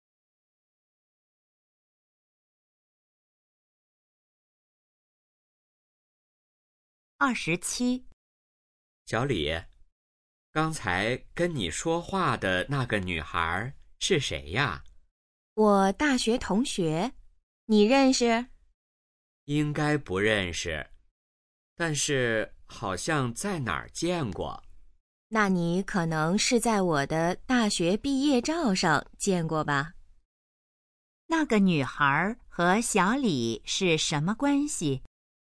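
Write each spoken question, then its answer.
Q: 那个女孩和小李是什么关系?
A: 大学同学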